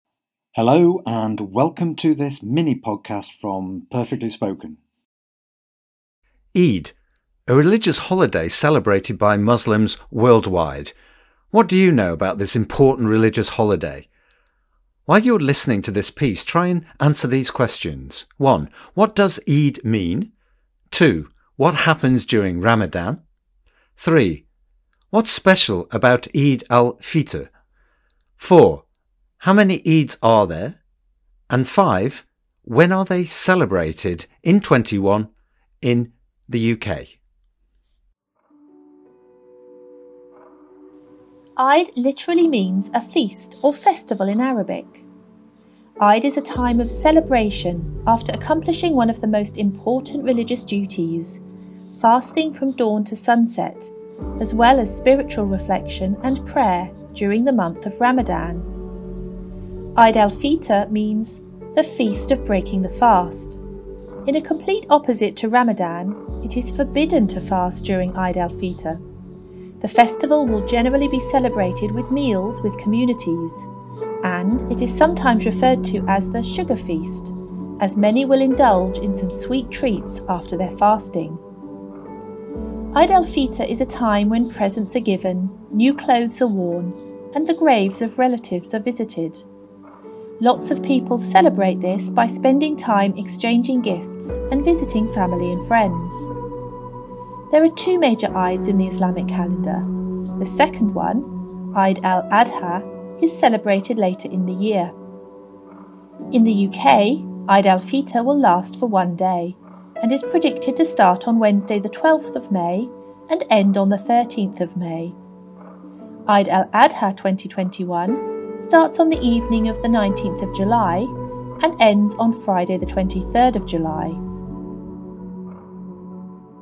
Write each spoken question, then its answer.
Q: What does Eid mean?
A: So Eid means feast or festival in Arabic.

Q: What happens during Ramadan?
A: Ramadan is a month of fasting, of not eating or drinking during the hours of daylight.

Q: What's special about Eid al-Fitr?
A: Eid al-Fitr is the time when fasting ends and people celebrate with meals and they give gifts and visit friends and family.

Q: How many Eids are there?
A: There are two Eids, Eid al-Fitr and Eid al-Adha.

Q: when are they celebrated in 21 in the UK?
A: In the UK, this year, the first Eid is in May, May the 12th, and the second Eid lasts for 3 days from July the 19th.